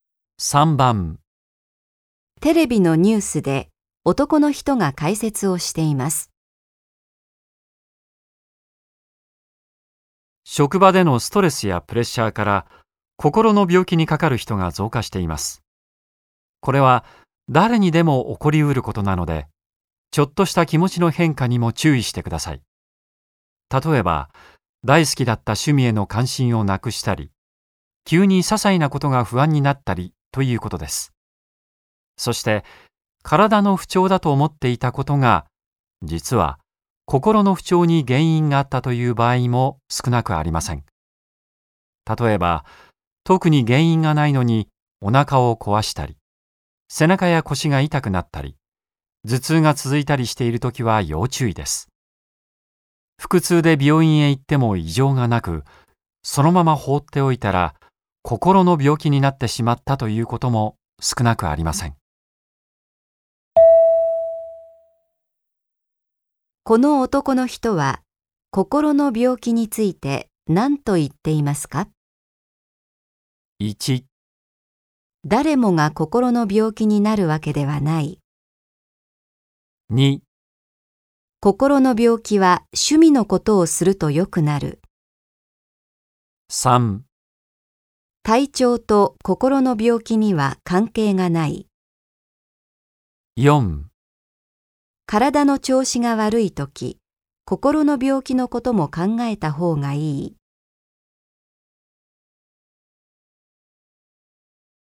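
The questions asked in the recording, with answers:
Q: この男の人は心の病気について何と言っていますか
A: 4: 体の調子が悪いとき、心の病気のことも考えた方がいい。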